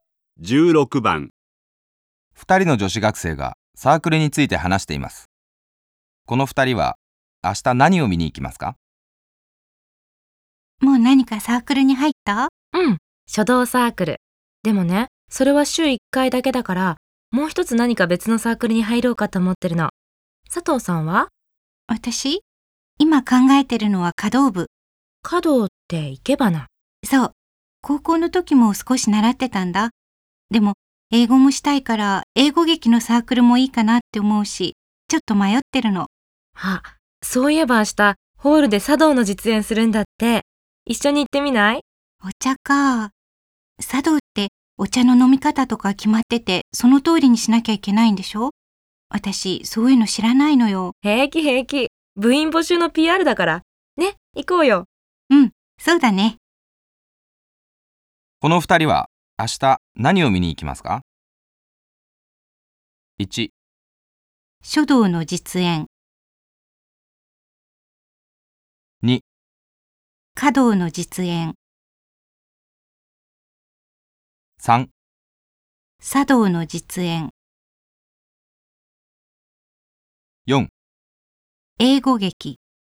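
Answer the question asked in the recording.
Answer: 3: 茶道の実演。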